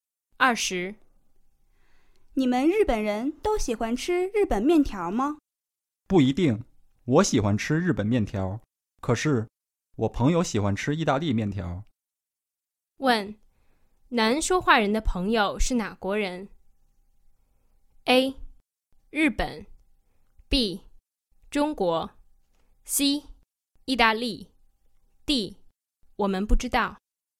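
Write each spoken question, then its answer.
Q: 问,男说话人的朋友是哪国人?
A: D: 我们不知道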